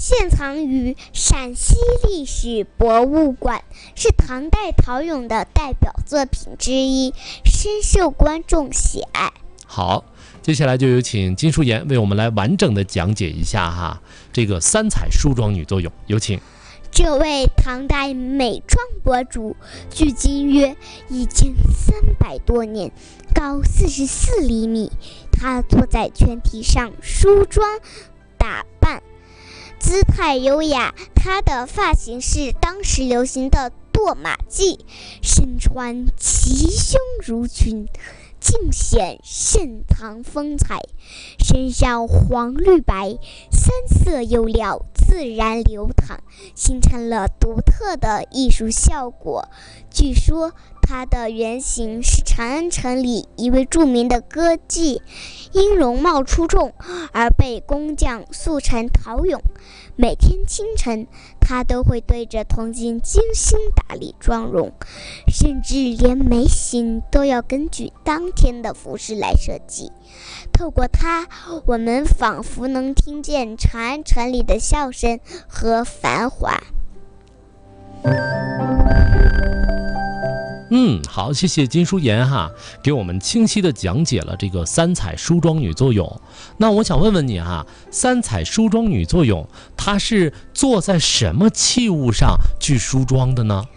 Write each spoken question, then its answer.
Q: 那我想问问你哈,三彩梳妆女作用,她是坐在什么器物上去梳妆的呢?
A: 全体。